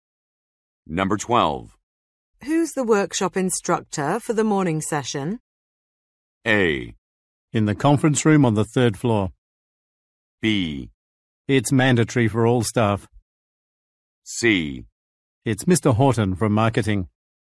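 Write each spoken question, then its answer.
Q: Who's the workshop instructor for the morning session?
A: C: It's Mr. Horton from marketing.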